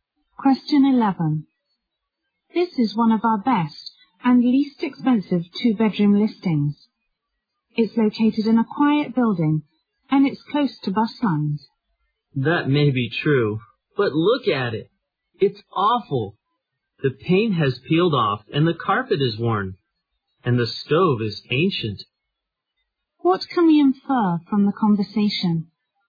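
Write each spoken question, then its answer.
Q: What can we infer from the conversation?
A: The woman doesn't like the apartment because it is in poor condition.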